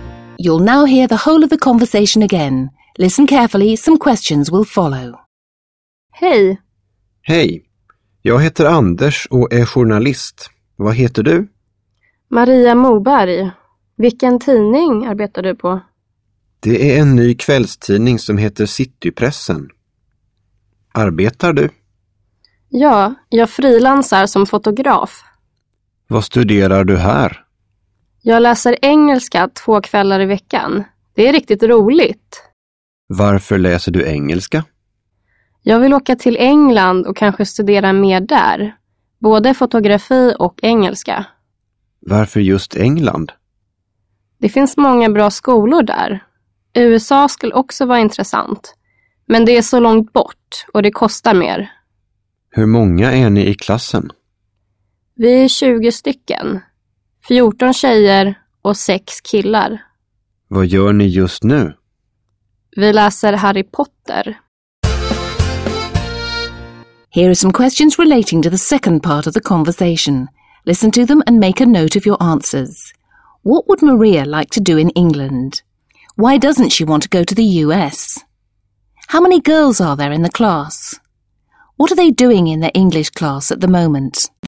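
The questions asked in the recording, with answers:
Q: What would Maria like to do in England?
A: Study more there, both photography and English

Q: Why doesn't she want to go to the US?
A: It's so far away and it costs more

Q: How many girls are there in the class?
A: 14

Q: What are they doing in their English class at the moment?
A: Reading Harry Potter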